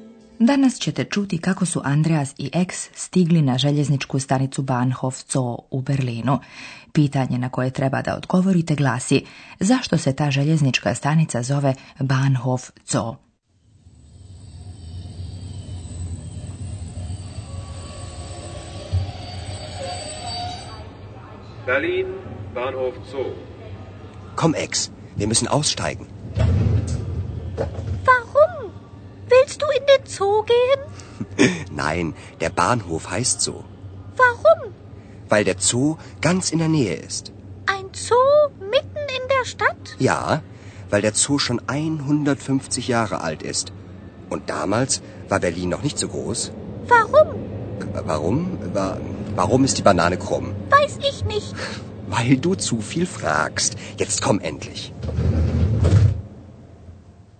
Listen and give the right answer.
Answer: Željeznička stanica se zove Bahnhof Zoo jer se nalazi u blizini zoološkog vrta.